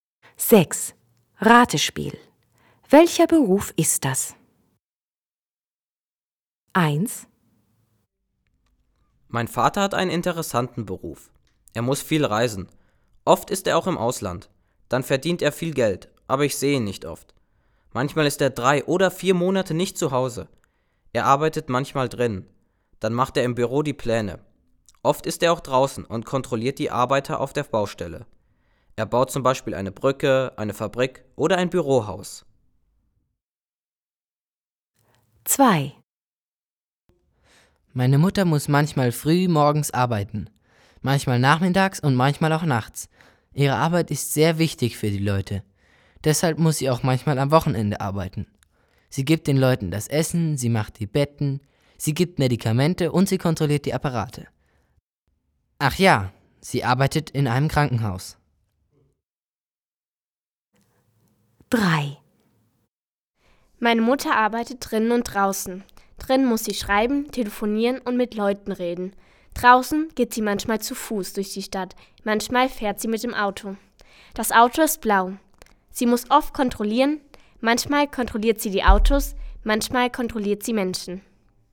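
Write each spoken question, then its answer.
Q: Welcher Beruf ist das?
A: Ingenieur (Bauingenieur)

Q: Welcher Beruf ist das?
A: Krankenschwester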